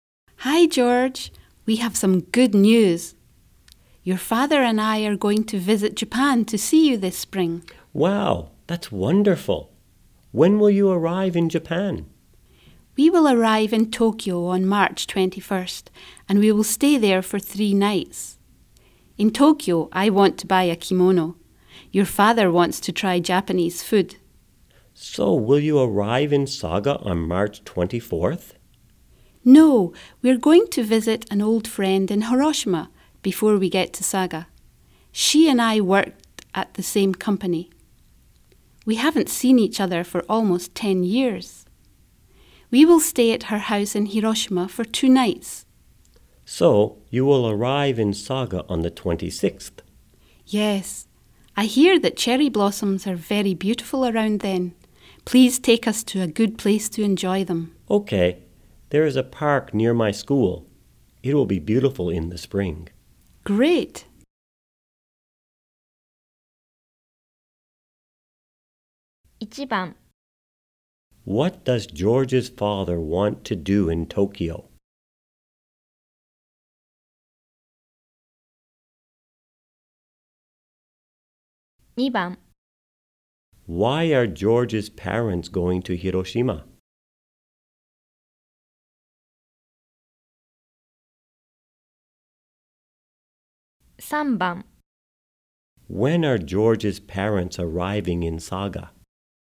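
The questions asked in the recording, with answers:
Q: What does George's father want to do in Tokyo?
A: Try Japanese food.

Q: Why are George's parents going to Hiroshima?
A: To visit an old friend of his mother's.

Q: When are George's parents arriving in Saga?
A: On March 26th.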